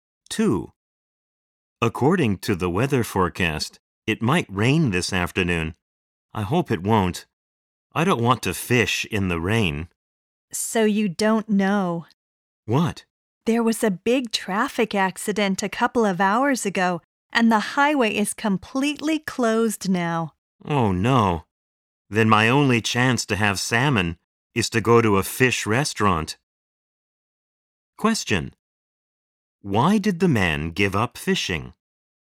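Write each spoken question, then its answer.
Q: Why did the man give up fishing?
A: Because the highway is closed due to a traffic accident.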